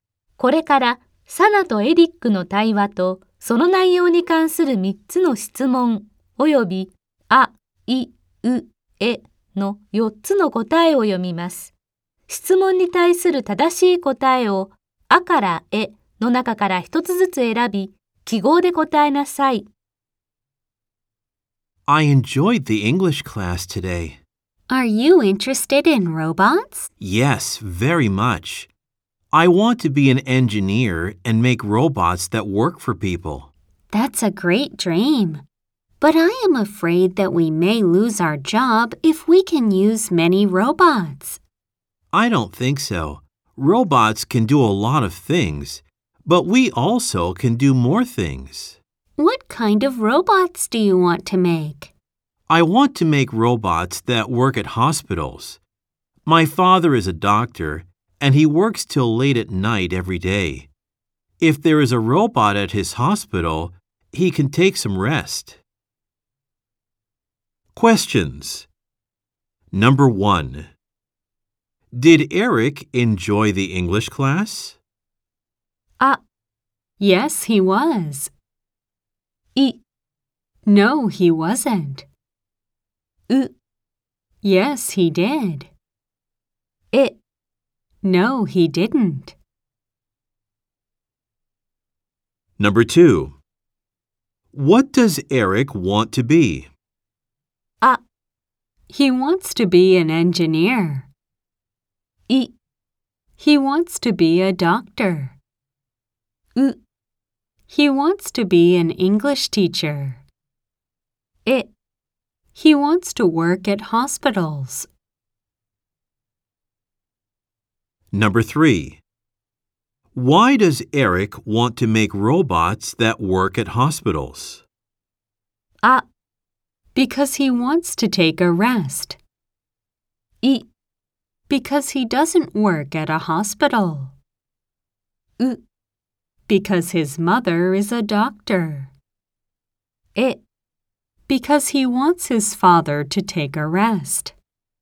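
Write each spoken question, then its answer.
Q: What does Eric want to be?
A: あ: He wants to be an engineer.

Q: Why does Eric want to make robots that work at hospitals?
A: え: Because he wants his father to take a rest.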